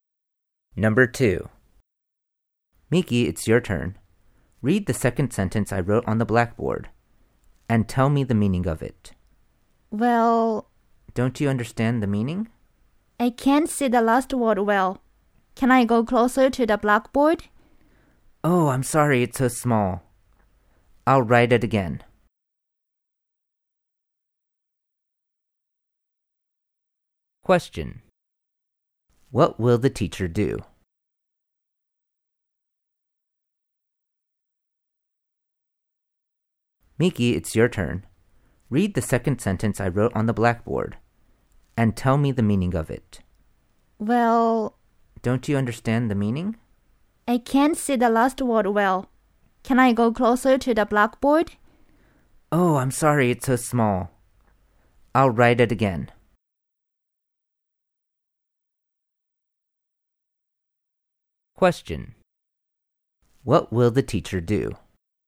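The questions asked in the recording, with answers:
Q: What will the teacher do?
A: Write the word on the blackboard again.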